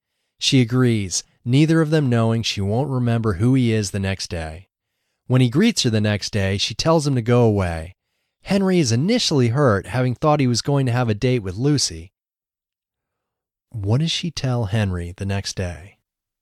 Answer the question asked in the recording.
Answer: She tells him to go away the next day.